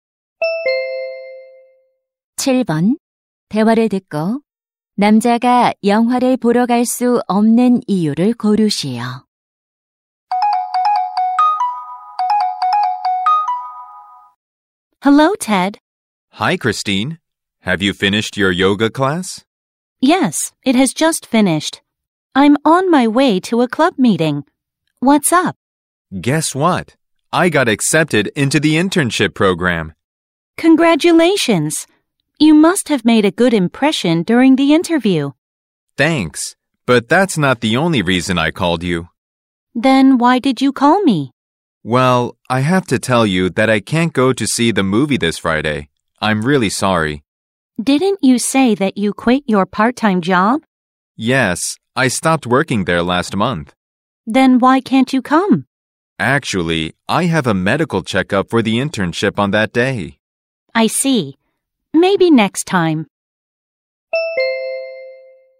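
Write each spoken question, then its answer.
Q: 대화를 듣고 남자가 영화를 보러 갈 수 없는 이유를 고르시오.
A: 인턴십 건강 검진이 있어서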